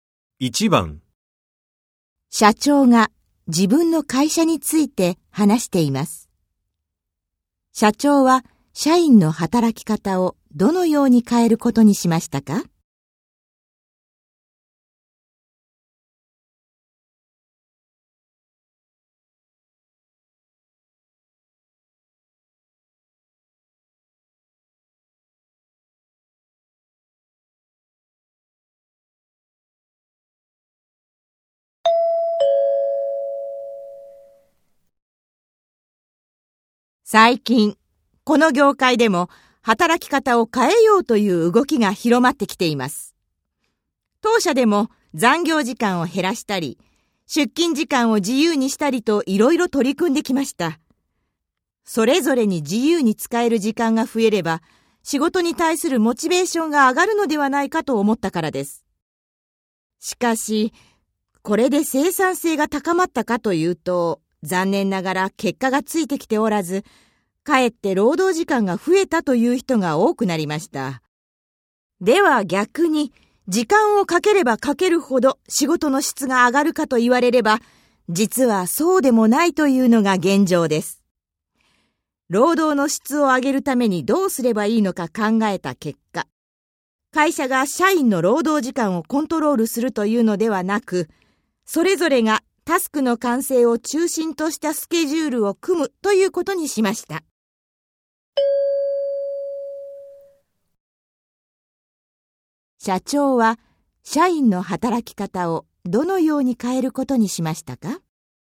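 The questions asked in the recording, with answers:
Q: 社長は社員の働き方をどのように変えることにしましたか?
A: 会社が労働時間をコントロールするのではなく、社員それぞれがタスクの完成を中心としたスケジュールを組むようにする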